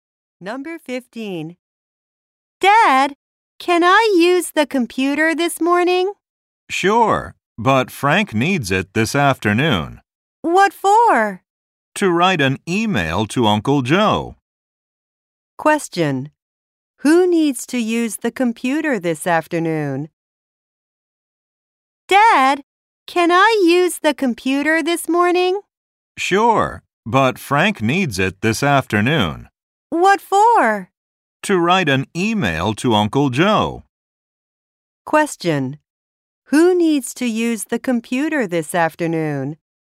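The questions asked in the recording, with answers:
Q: Who needs to use the computer this afternoon?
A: Frank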